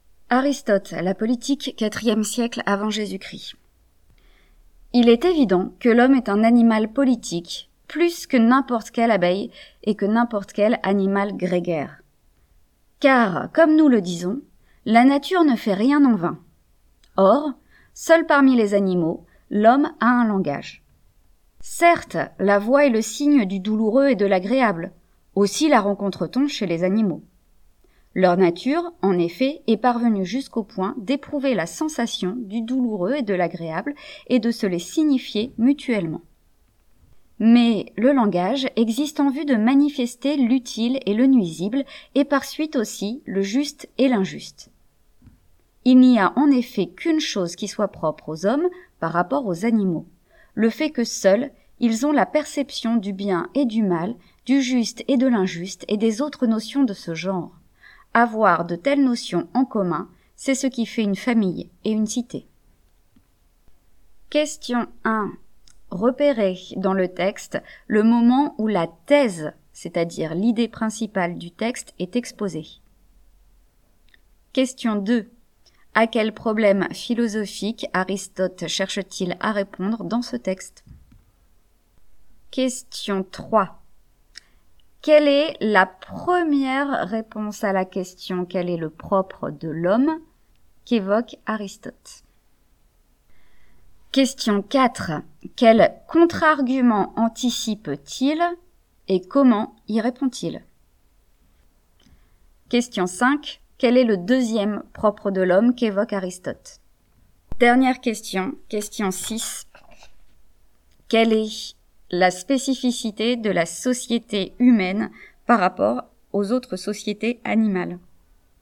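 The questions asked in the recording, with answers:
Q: Repérez dans le texte le moment où la thèse, c'est-à-dire l'idée principale du texte, est exposée.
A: Au début : « l'homme est un animal politique, plus que n'importe quelle abeille »

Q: Quelle est la première réponse à la question « Quel est le propre de l'homme ?» qu'évoque Aristote.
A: Seul parmi les animaux, l'homme a un langage

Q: Quel contre-argument anticipe-t-il et comment y répond-il?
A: Les animaux ont une voix. Mais elle exprime seulement le douloureux et l'agréable, alors que le langage manifeste l'utile, le nuisible, le juste et l'injuste

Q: Quel est le deuxième propre de l'homme qu'évoque Aristote?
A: Seuls les hommes perçoivent le bien et le mal, le juste et l'injuste

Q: Quelle est la spécificité de la société humaine par rapport aux autres sociétés animales?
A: Elle repose sur des notions communes du bien et du juste, qui font la famille et la cité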